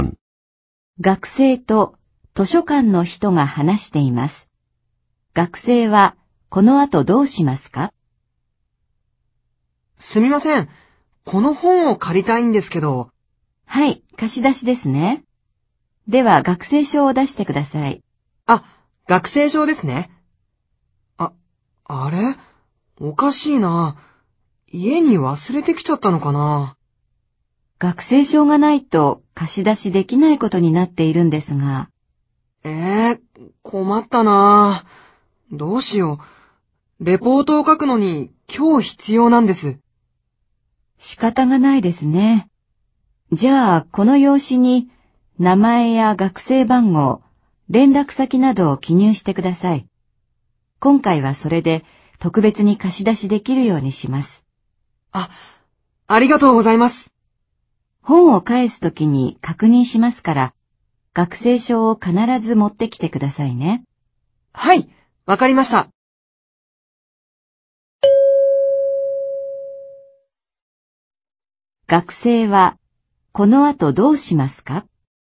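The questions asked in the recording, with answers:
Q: 学生はこの後どうしますか?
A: 用紙に名前や学生番号、連絡先などを記入する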